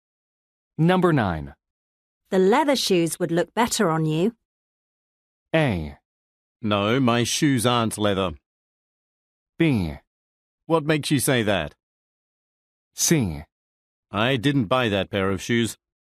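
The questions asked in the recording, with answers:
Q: The leather shoes would look better on you.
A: B: What makes you say that?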